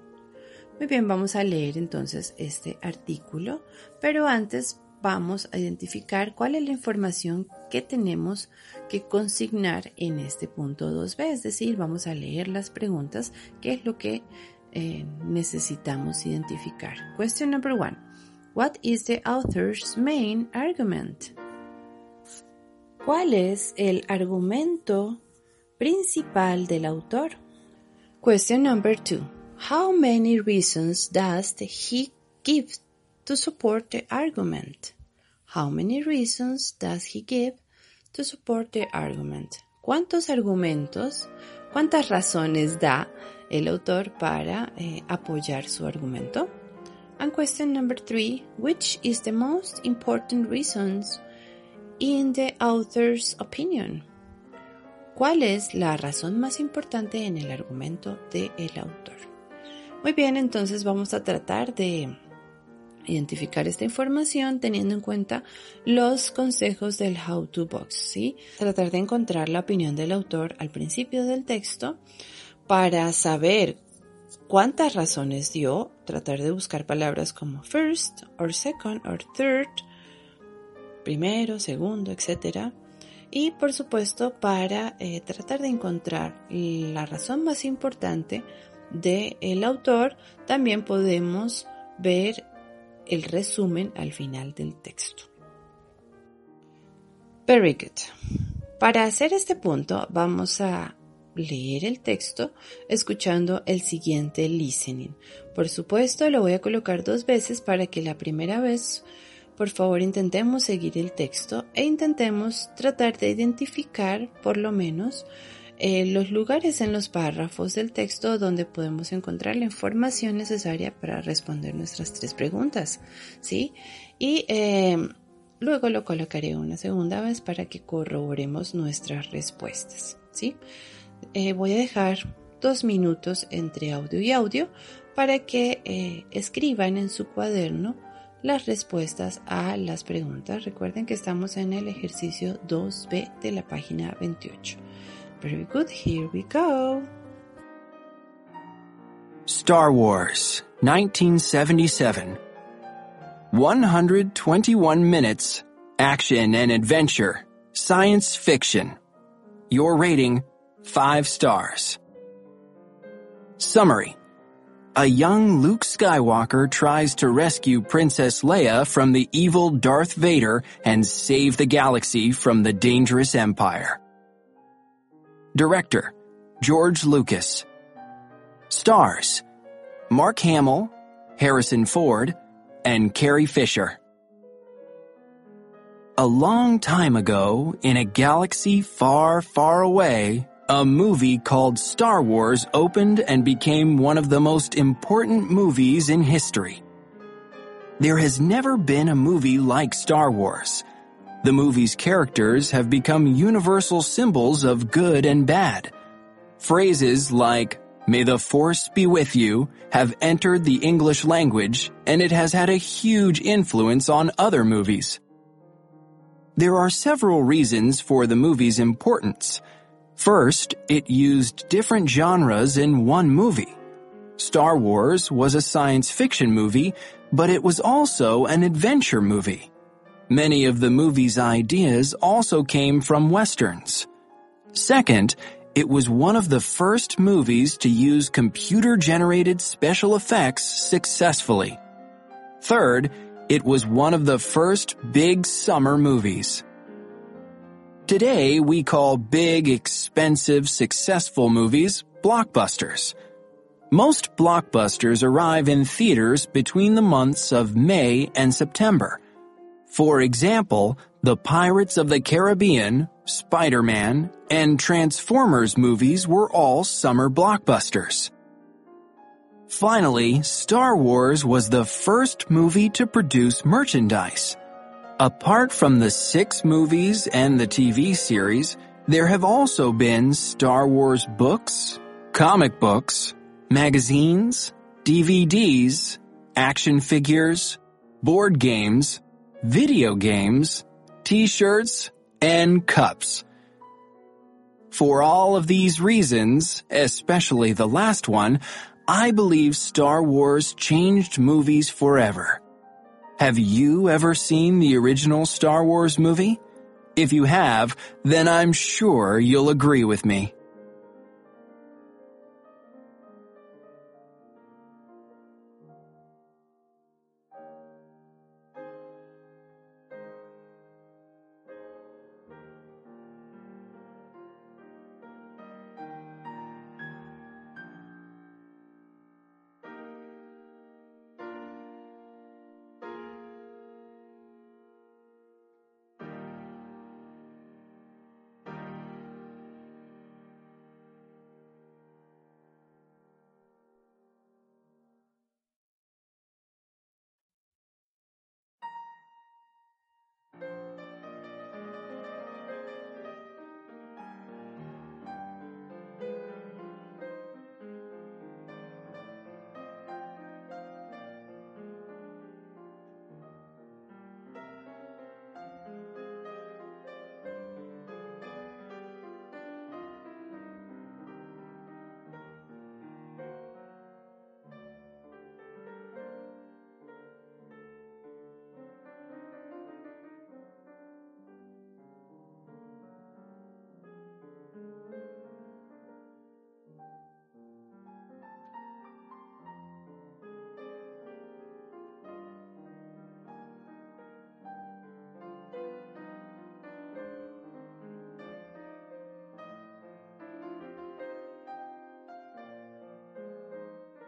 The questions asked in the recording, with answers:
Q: What is the author's main argument?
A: The answer could be that Star Wars is one of the most important movies in history, right?

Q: How many reasons does he give to support the argument?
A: The answer could be, of course, 4, right?

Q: which is the most important reasons in the author's opinion?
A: the answer could be, like, Star Wars was the first movie to produce merchandise, right?